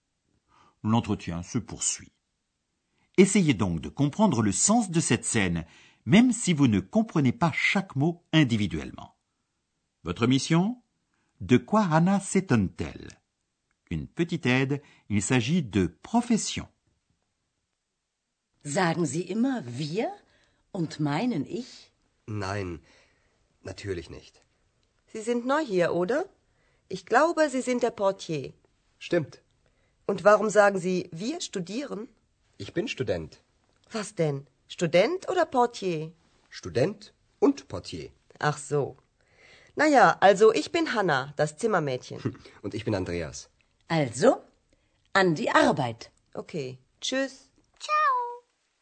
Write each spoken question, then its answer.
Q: De quoi Anna s'étonne-t-elle ?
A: Anna s'étonne qu'Andreas affirme être étudiant, alors qu'il lui a déclaré auparavant être le portier de l'hôtel.